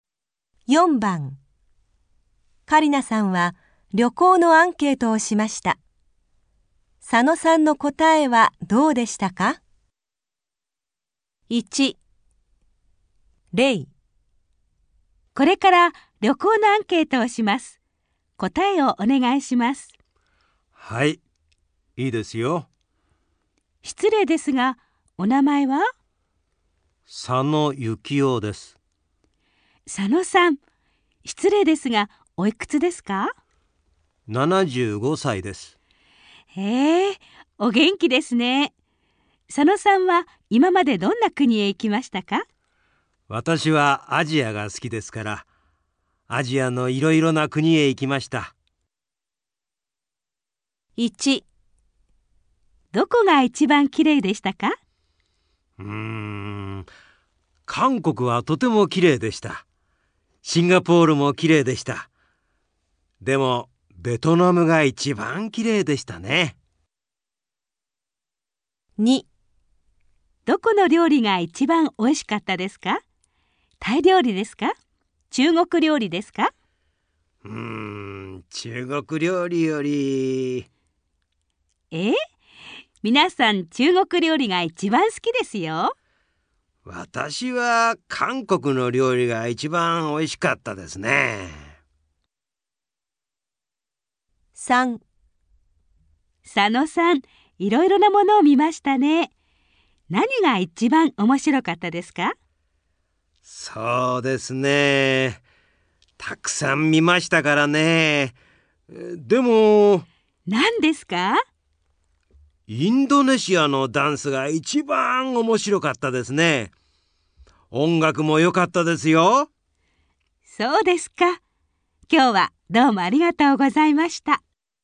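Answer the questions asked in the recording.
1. ベトナム
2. 韓国の料理
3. インドネシアのダンス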